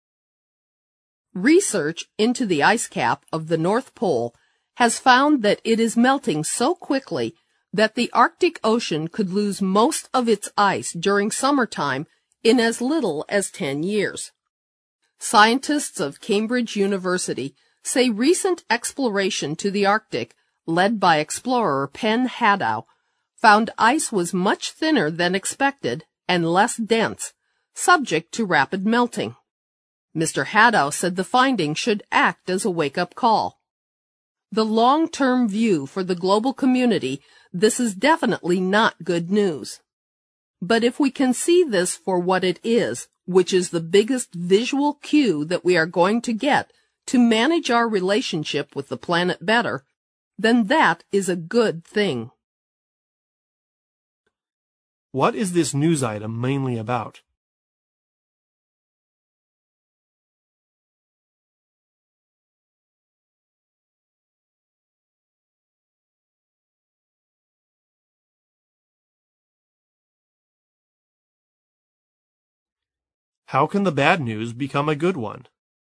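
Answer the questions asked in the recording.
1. The Arctic ice cap is melting fast and could lose most of its summer ice in about 10 years
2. If people see it as a warning to manage their relationship with the planet better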